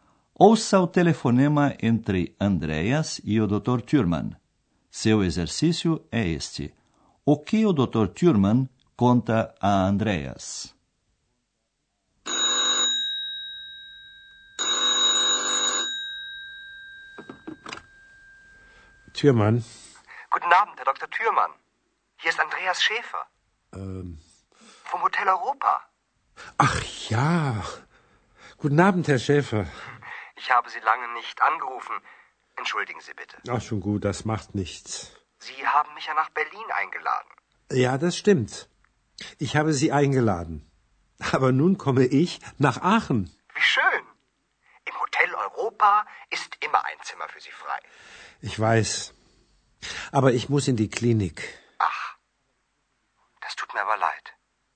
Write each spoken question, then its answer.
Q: O que o Dr. Thurman conta a Andreas?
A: Em primeiro lugar, que o Dr. Thurman vem para Aachen, e depois que o Dr. Thurman tem que ir para uma clínica.